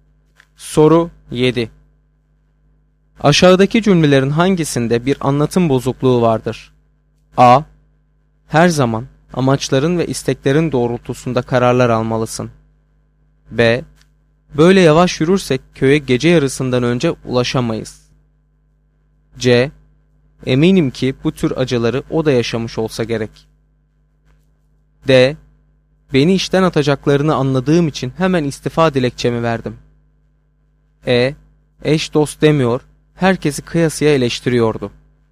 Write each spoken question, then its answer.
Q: Aşağıdaki cümlelerin hangisinde bir anlatım bozukluğu vardır?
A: Doğru cevap C şıkkı.